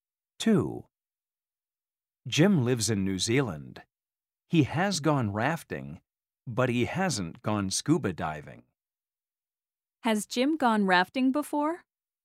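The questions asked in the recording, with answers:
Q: Has Jim gone rafting before?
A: Yes, he has.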